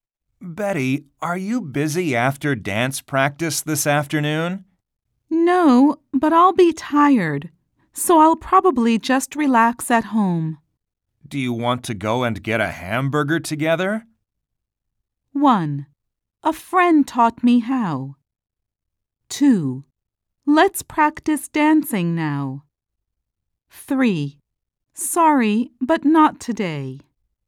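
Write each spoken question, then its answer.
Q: Do you want to go and get a hamburger together?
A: 3: Sorry, but not today.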